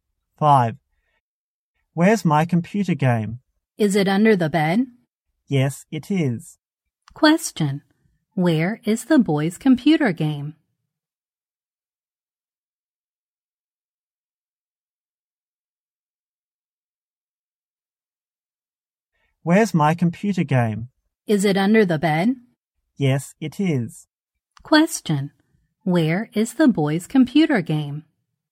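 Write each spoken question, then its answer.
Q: Where is the boy's computer game?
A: Under the bed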